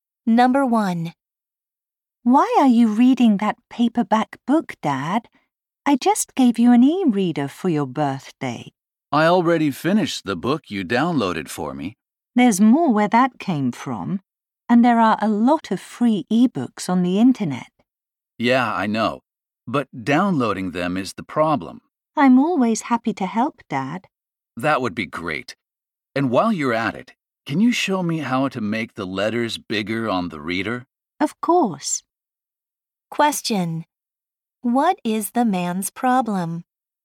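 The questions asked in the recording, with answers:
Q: What is the man's problem?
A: He has trouble downloading e-books.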